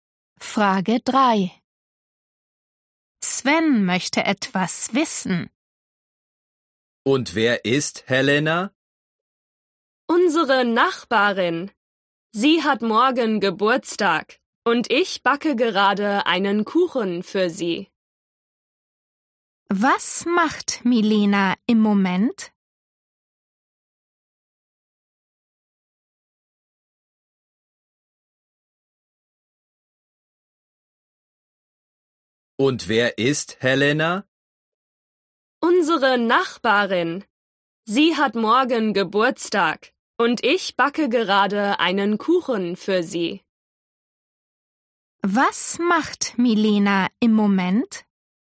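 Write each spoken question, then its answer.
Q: Was macht Milena im Moment?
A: Sie backt einen Kuchen.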